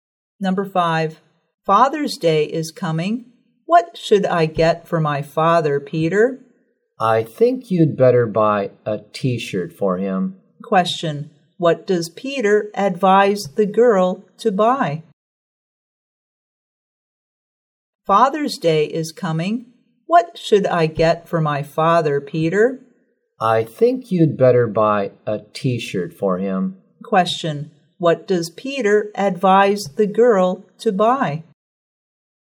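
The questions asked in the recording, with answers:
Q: what does Peter advise the girl to buy?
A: A T-shirt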